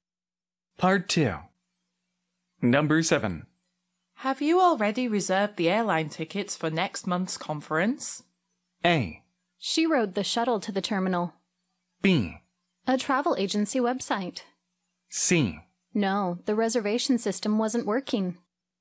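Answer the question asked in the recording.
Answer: C: No, the reservation system wasn't working.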